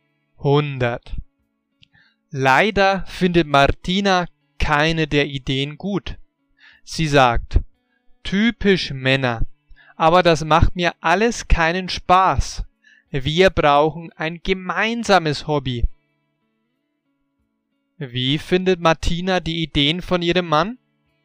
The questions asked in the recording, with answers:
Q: Wie findet Martina die Ideen von ihrem Mann?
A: Sie findet seine Ideen nicht gut.